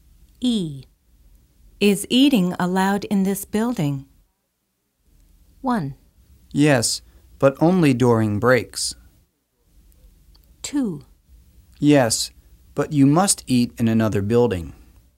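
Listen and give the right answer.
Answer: 1: Yes, but only during breaks.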